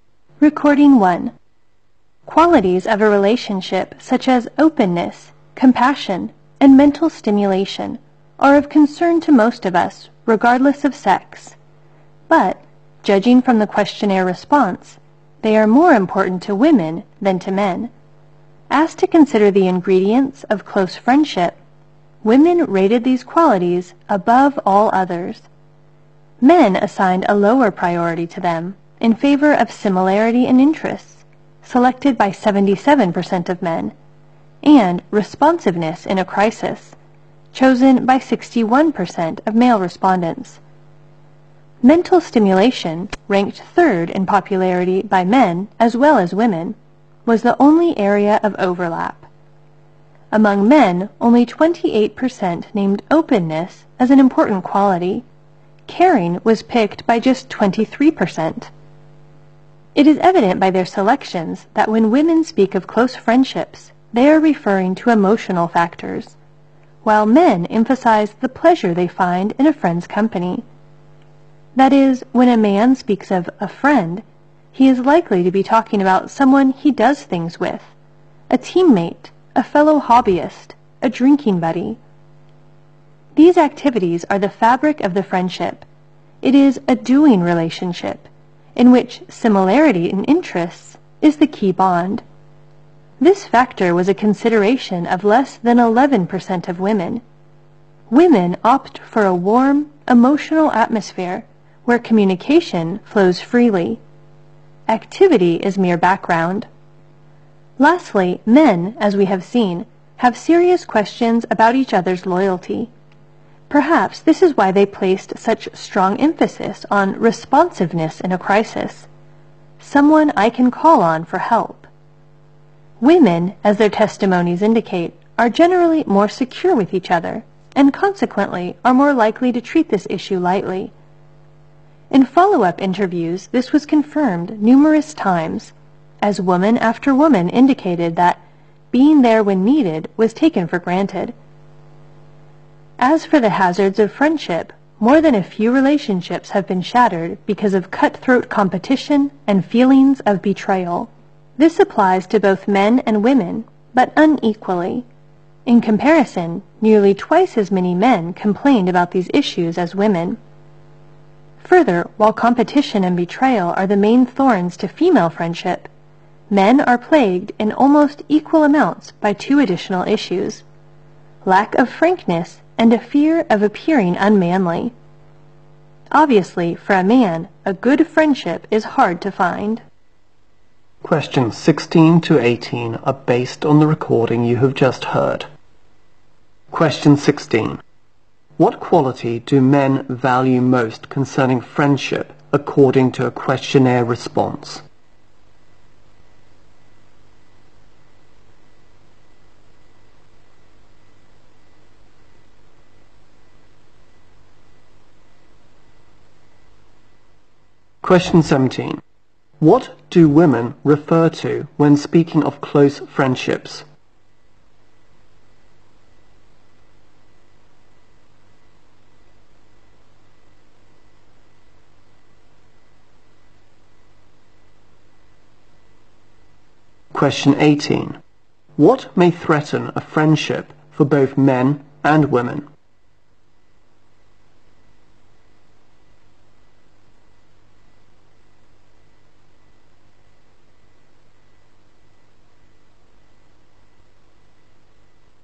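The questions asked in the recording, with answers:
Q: What quality do men value most concerning friendship according to a questionnaire response?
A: Similarity in interests

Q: What do women refer to when speaking of close friendships?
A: Emotional factors

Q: What may threaten a friendship for both men and women?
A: Cutthroat competition and feelings of betrayal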